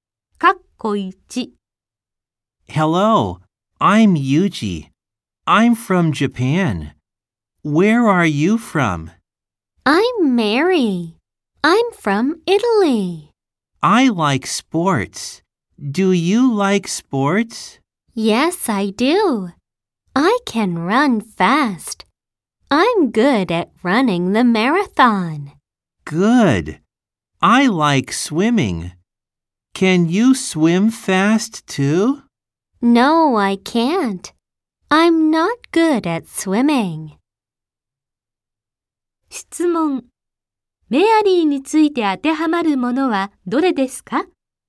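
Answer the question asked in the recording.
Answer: イタリア出身で、スポーツと水泳が好き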